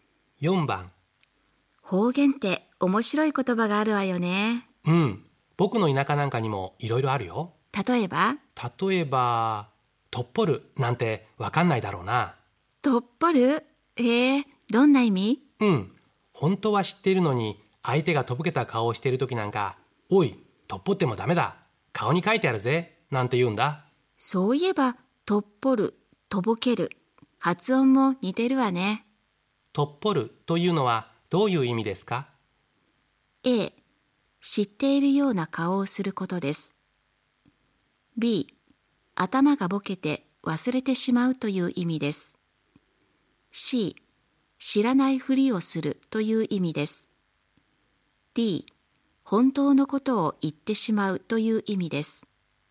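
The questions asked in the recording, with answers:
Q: とっぽる」というのはどういう意味ですか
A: C: 知らないふりをするという意味です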